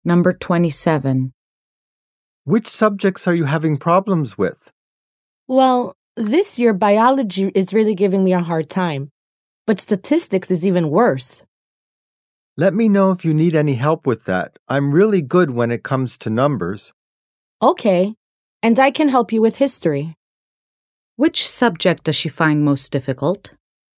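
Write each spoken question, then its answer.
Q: Which subject does she find most difficult?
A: Statistics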